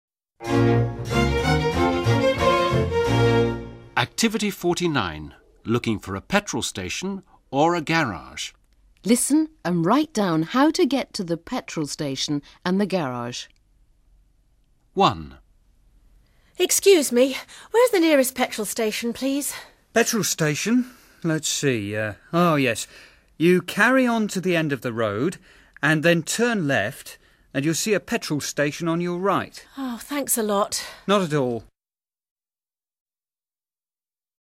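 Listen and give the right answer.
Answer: Go to the end of the road, turn left, and the petrol station is on the right.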